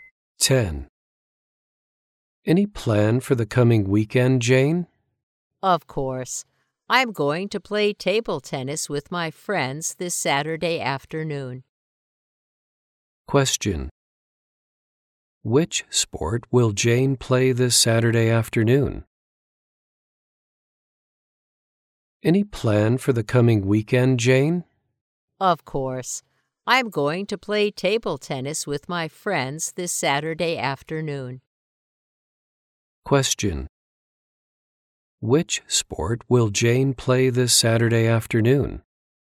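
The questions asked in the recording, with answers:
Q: Which sport will Jane play this Saturday afternoon?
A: Table tennis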